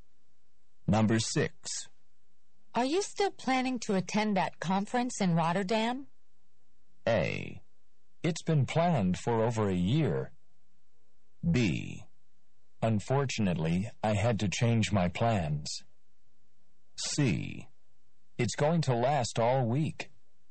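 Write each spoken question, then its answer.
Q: Are you still planning to attend that conference in Rotterdam?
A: B: Unfortunately, I had to change my plans.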